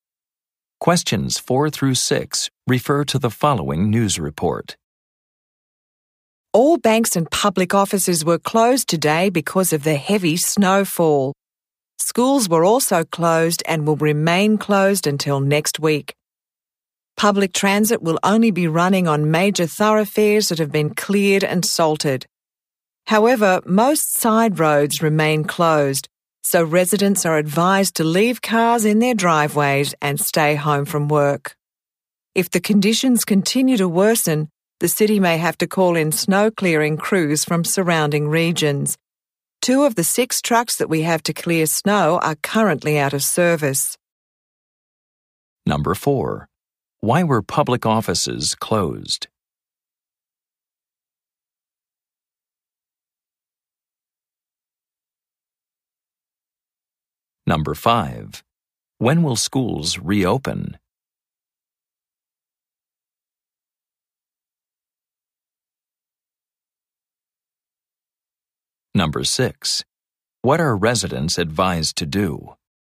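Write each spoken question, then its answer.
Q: Why were public offices closed?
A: Heavy snowfall

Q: When will schools reopen?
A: Next week

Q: What are residents advised to do?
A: Leave cars at home and stay home from work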